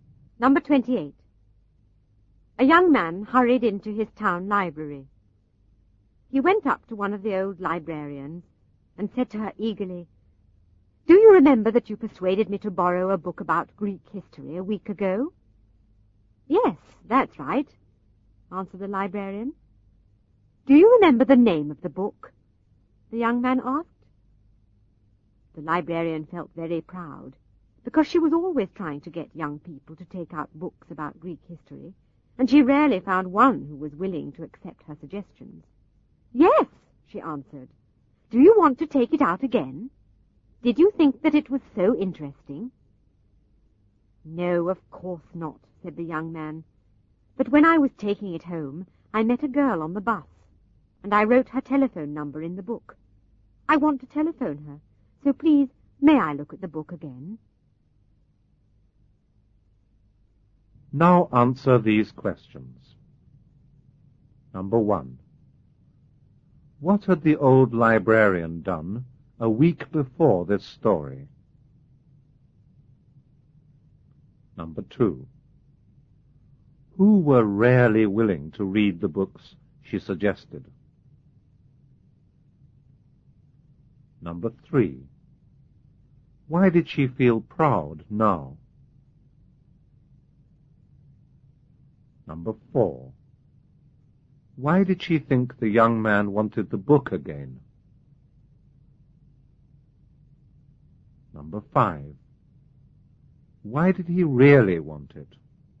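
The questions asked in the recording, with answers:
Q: What had the old librarian done a week before this story?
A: She had persuaded the young man to borrow a book about Greek history.

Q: Who were rarely willing to read the books she suggested?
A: Young people

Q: Why did she feel proud now?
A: Because she thought a young man had accepted her suggestion and liked the Greek history book.

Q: Why did she think the young man wanted the book again?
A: She thought he had found it very interesting.

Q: Why did he really want it?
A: He had written a girl's telephone number in it and wanted to phone her.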